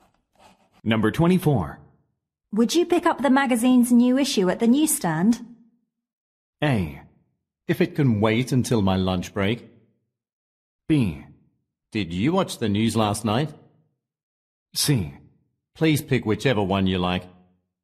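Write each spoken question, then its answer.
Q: Would you pick up the magazine's new issue at the newsstand?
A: A: If it can wait until my lunch break.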